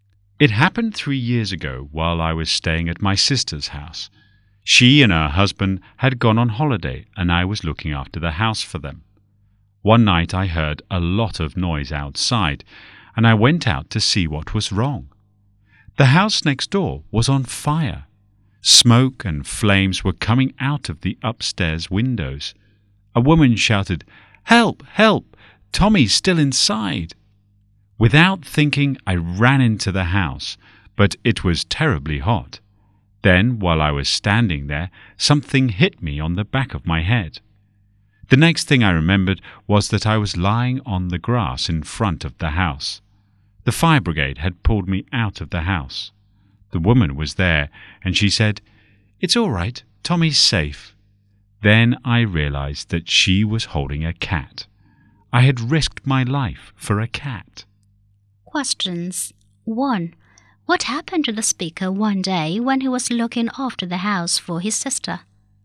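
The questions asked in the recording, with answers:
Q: What happened to the speaker one day when he was looking after the house for his sister?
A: He ran into the burning house next door to save 'Tommy', was hit on the head and pulled out, and Tommy turned out to be a cat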